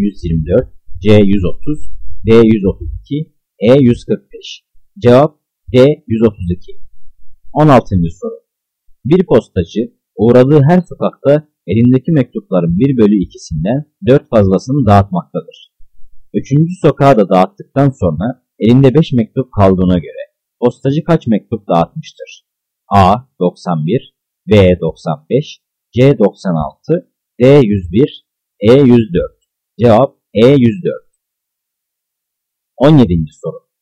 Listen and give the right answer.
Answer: Cevap E. 104.